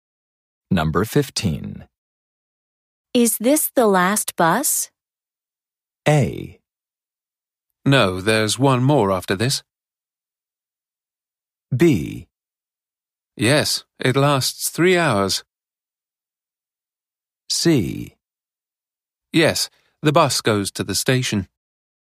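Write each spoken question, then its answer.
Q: Is this the last bus?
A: A: No, there's one more after this.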